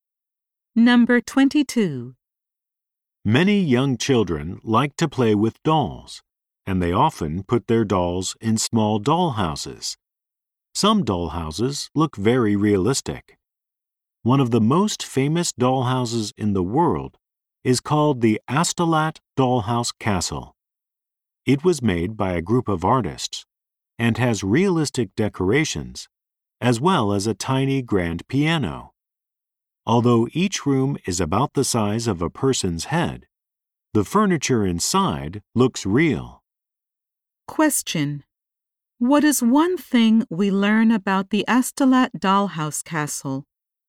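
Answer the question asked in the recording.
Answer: It was made by a group of artists and has realistic decorations, including a tiny grand piano.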